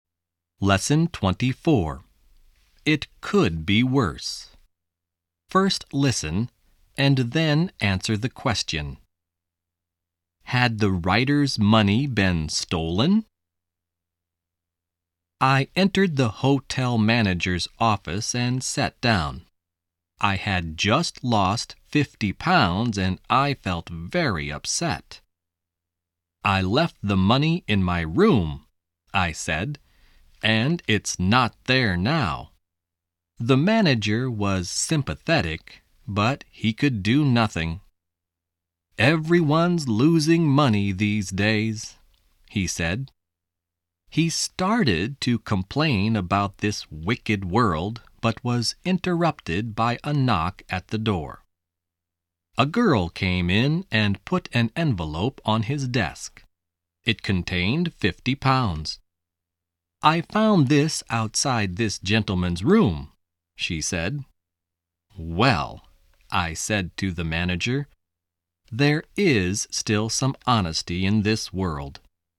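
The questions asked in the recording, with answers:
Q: Had the writer's money been stolen?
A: No, it hadn't. A girl found it outside his room.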